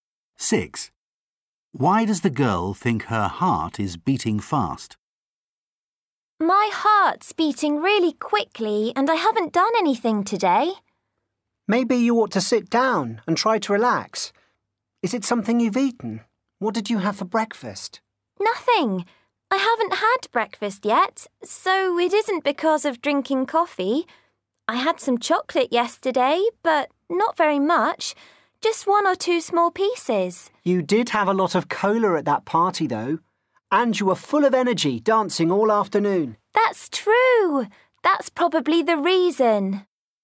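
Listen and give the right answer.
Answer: She drank a lot of cola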